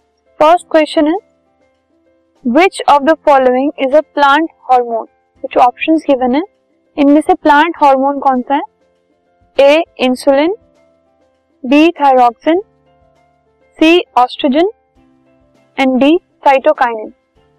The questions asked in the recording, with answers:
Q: which of the following is a plant hormone?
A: तो इन सब में D जो है cytokinin